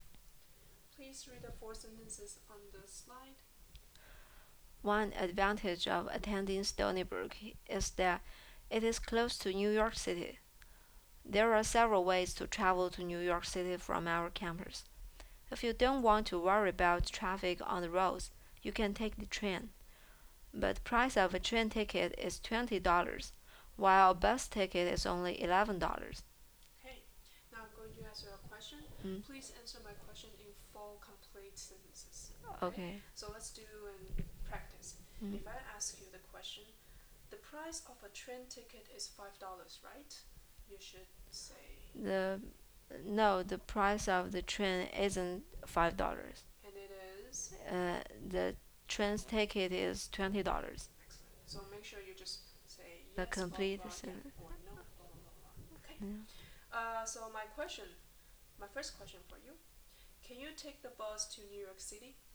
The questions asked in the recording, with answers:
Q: Can you take the bus to New York City?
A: Yes, I can take the bus to New York City.